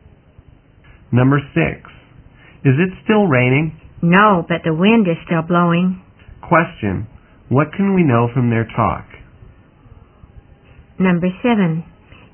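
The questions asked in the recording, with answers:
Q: What can we know from their talk?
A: It has stopped raining but it is still windy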